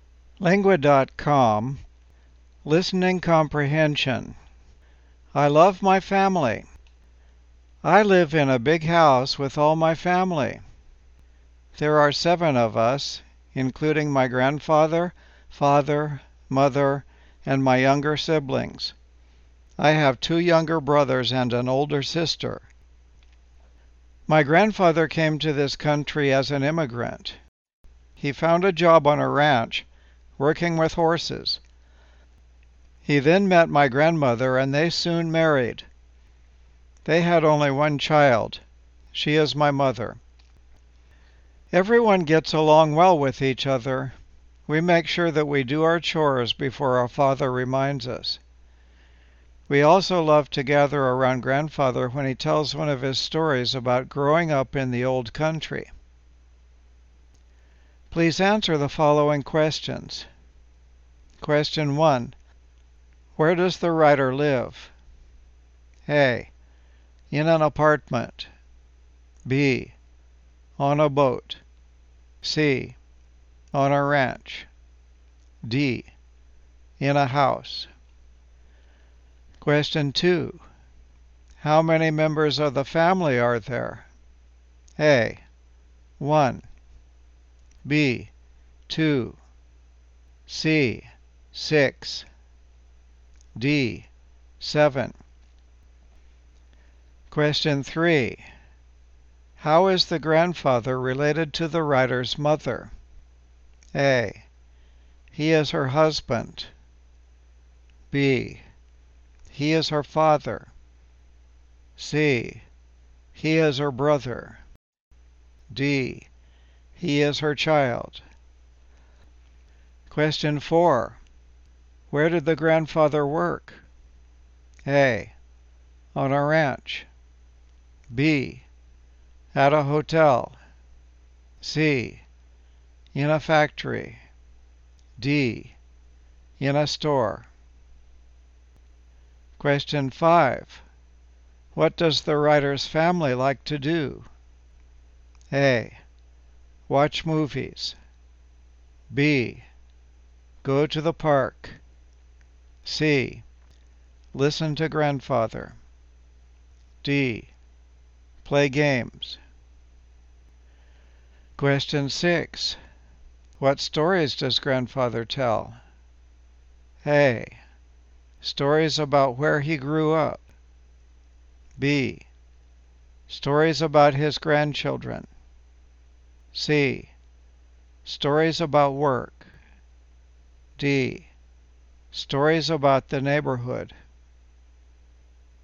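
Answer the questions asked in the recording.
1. D: In a house.
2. D: 7.
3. B: He is her father.
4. A: On a ranch.
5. C: Listen to grandfather.
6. A: Stories about where he grew up.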